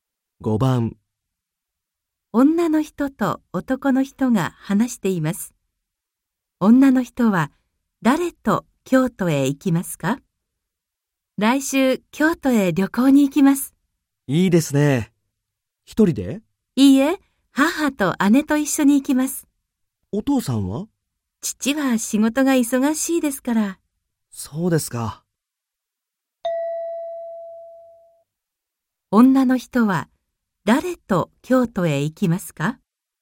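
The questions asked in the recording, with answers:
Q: 女の人は誰と京都へ行きますか?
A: 母と姉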